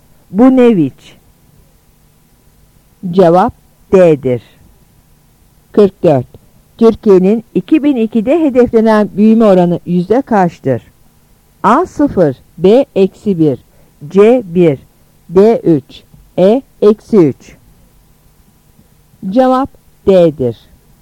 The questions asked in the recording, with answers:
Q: Türkiye'nin 2002'de hedeflenen büyüme oranı yüzde kaçtır?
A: Cevap D'dir.